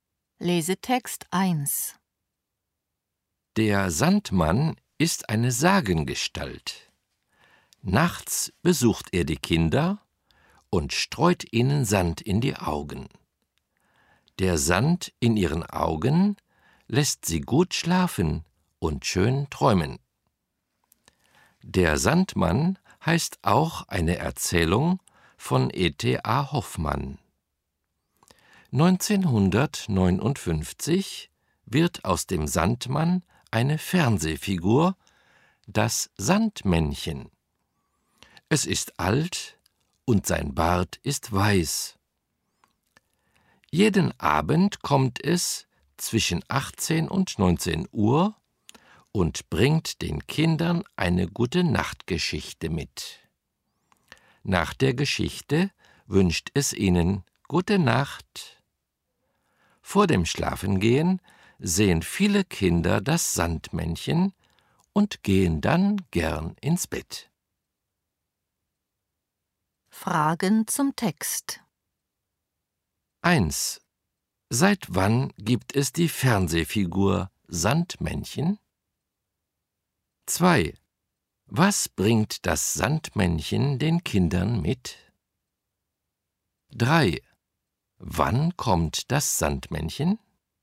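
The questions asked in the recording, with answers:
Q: Seit wann gibt es die Fernsehfigur Sandmännchen?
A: Seit 1959

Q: Was bringt das Sandmännchen den Kindern mit?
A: Eine Gute-Nacht-Geschichte

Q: Wann kommt das Sandmännchen?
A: Jeden Abend zwischen 18 und 19 Uhr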